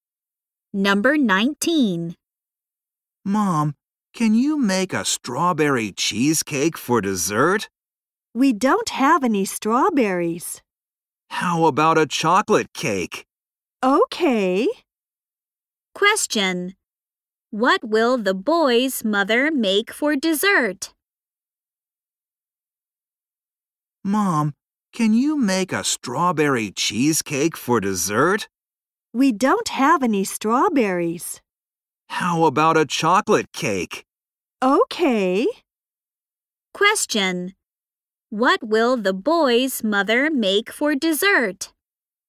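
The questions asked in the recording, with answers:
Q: What will the boy's mother make for dessert?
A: A chocolate cake.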